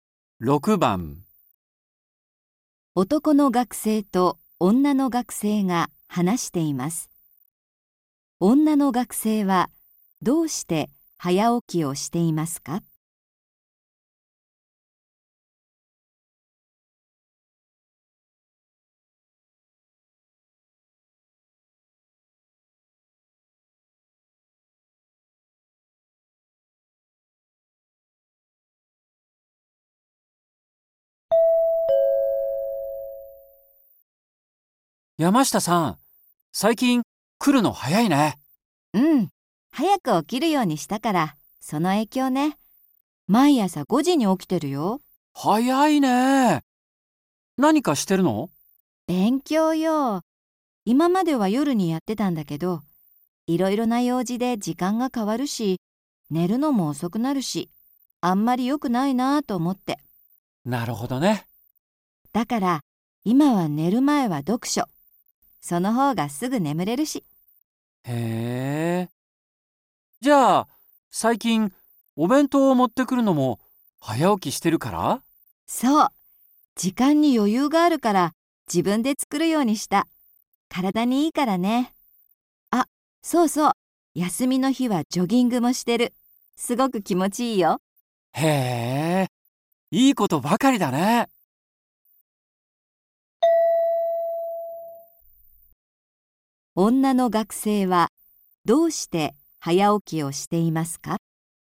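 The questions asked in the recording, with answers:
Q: 女の学生はどうして早起きをしていますか?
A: 朝に勉強するため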